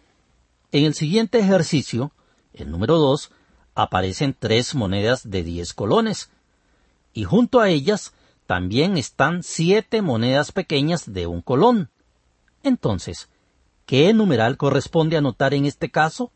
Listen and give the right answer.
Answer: Por supuesto, lo adecuado es apuntar el número 37.